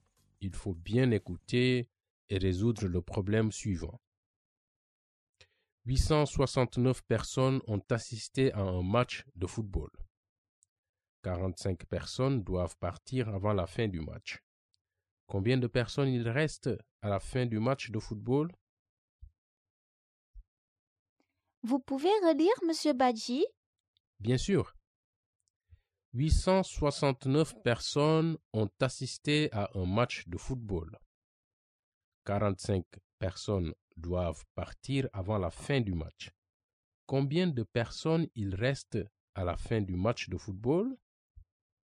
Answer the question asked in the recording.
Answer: Donc, il y a 824 personnes à la fin du match de football.